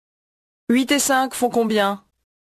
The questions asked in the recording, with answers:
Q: 8 et 5 font combien?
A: 13.